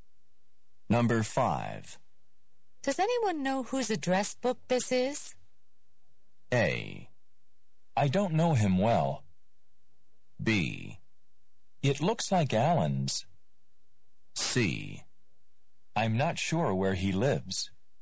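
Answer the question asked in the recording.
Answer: B: It looks like Alan's.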